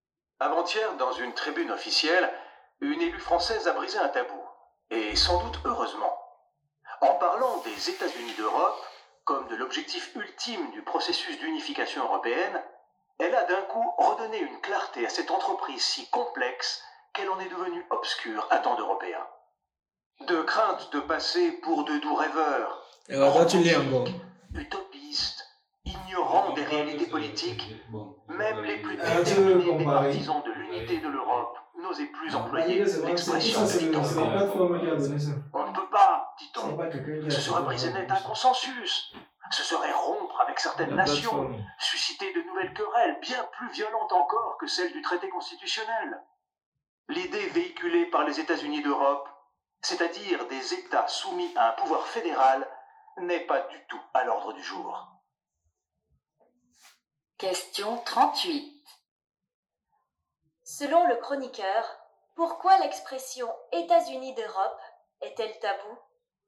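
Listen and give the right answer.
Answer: Parce que ceux qui l'emploient craignent de passer pour des rêveurs utopistes, et qu'elle briserait le consensus en provoquant de nouvelles querelles entre nations.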